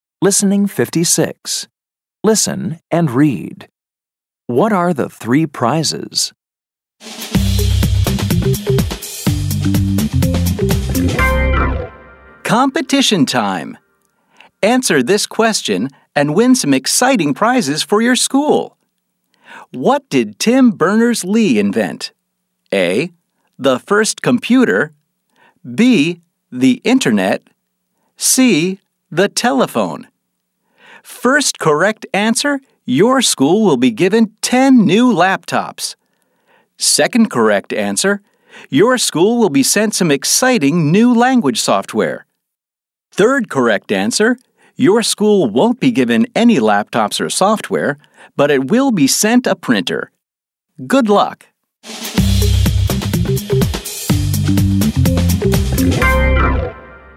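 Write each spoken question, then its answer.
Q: What are the three prizes?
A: 10 new laptops, some new language software, and a printer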